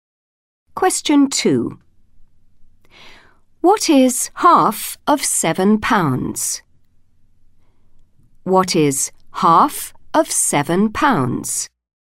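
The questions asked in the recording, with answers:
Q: What is half of £7?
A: £3.50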